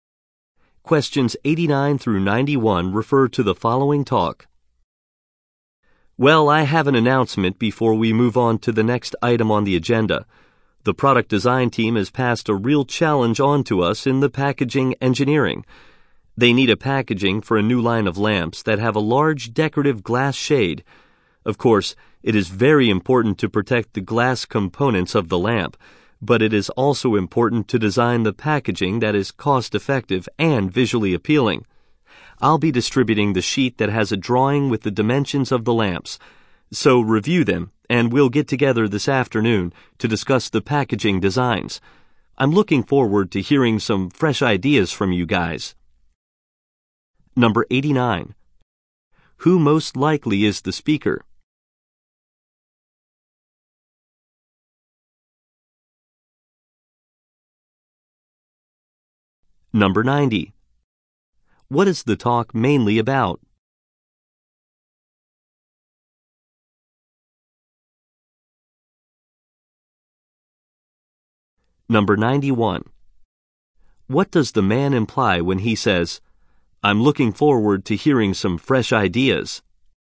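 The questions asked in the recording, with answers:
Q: Who most likely is the speaker?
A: A packaging engineer

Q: What is the talk mainly about?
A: Designing packaging for a new line of lamps

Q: What does the man imply when he says, "I'm looking forward to hearing some fresh ideas"?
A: He wants the listeners to come up with new packaging designs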